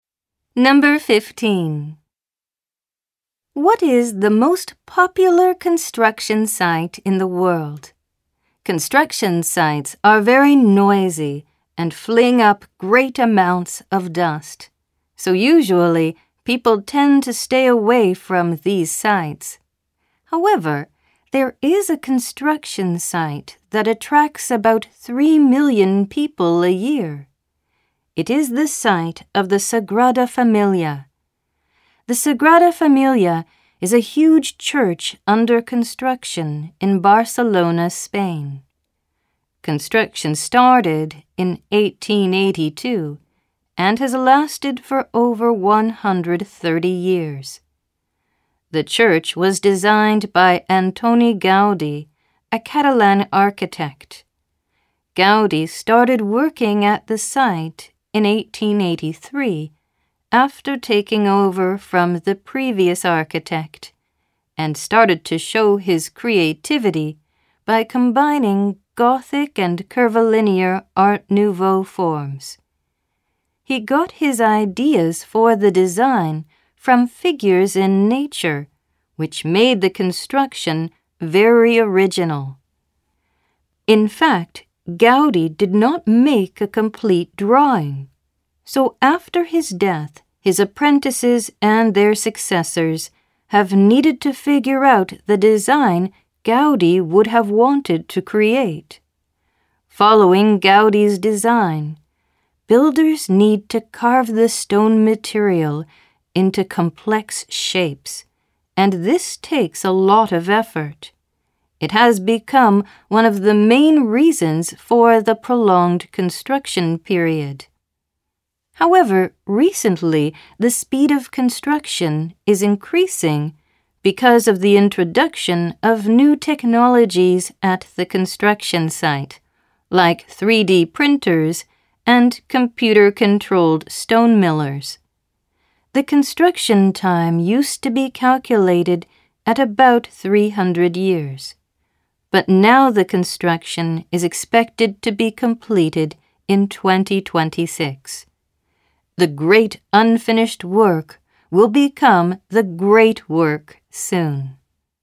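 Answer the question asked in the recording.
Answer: The Sagrada Familia in Barcelona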